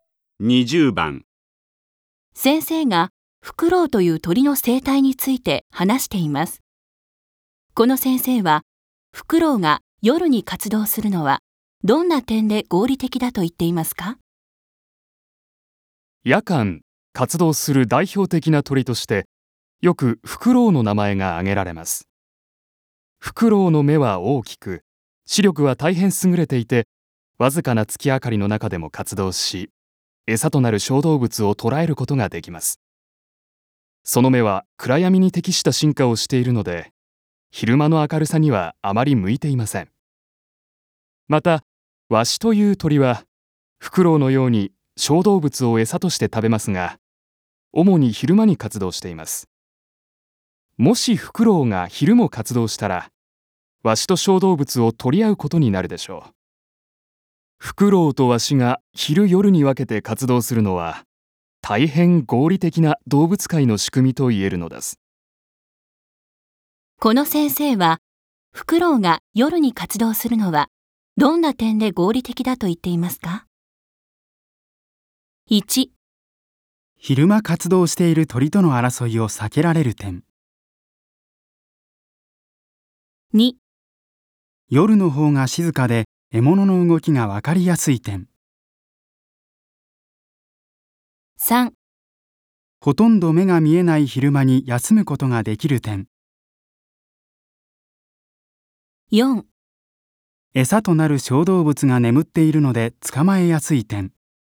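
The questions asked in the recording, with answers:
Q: この先生は、フクロウが夜に活動するのは、どんな点で合理的だと言っていますか?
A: 1: 昼間活動している鳥との争いを避けられる点。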